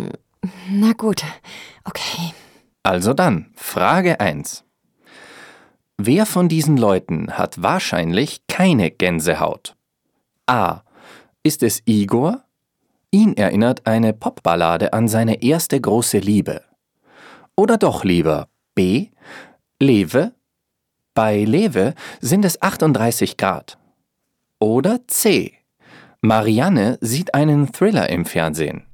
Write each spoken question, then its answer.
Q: Wer von diesen Leuten hat wahrscheinlich keine Gänsehaut?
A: Das ist richtig. Wer Angst hat, bekommt eine Gänsehaut.